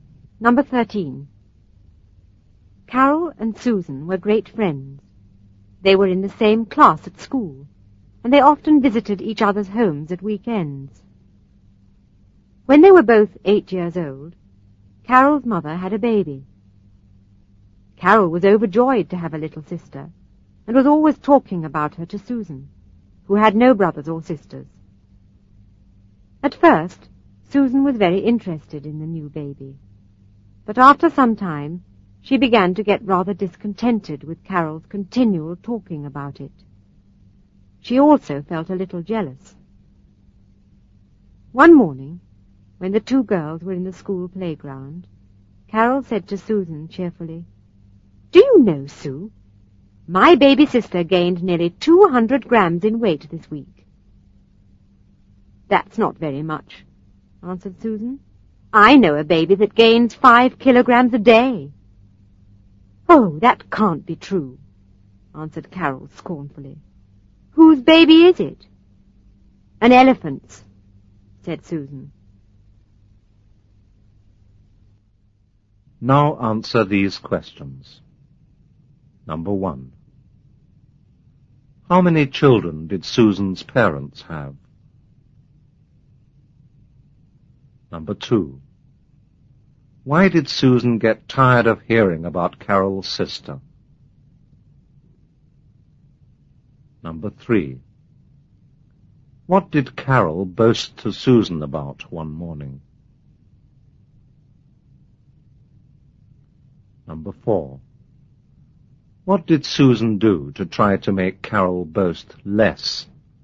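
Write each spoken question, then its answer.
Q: How many children did Susan's parents have?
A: One (only Susan)

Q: Why did Susan get tired of hearing about Carol's sister?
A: Carol talked about her all the time and Susan felt a little jealous

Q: What did Carol boast to Susan about one morning?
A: Her baby sister gained nearly 200 grams in a week

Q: What did Susan do to try to make Carol boast less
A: She said she knew a baby (an elephant's) that gains 5 kilograms a day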